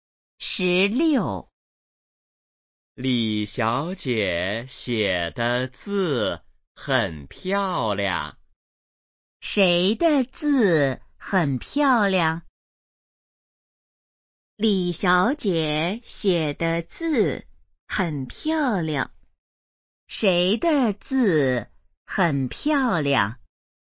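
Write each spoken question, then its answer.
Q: 谁的字很漂亮?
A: 李小姐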